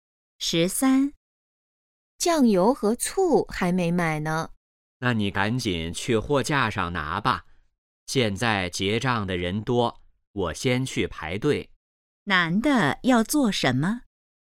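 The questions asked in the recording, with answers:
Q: 男的要做什么?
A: 去排队结账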